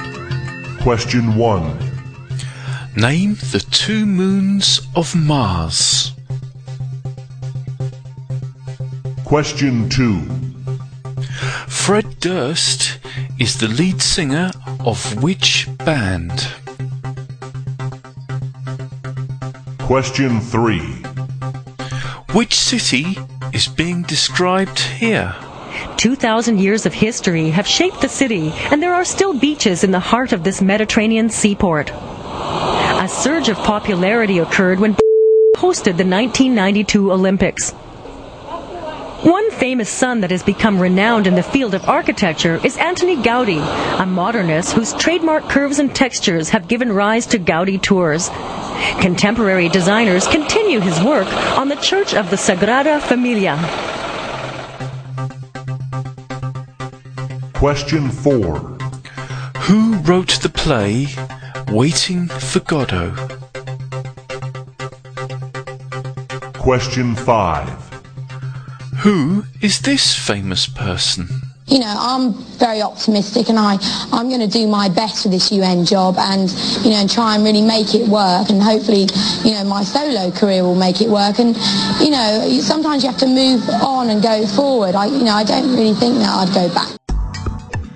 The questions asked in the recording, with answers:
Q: Which city is being described here?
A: the city being described here is Barcelona in Spain.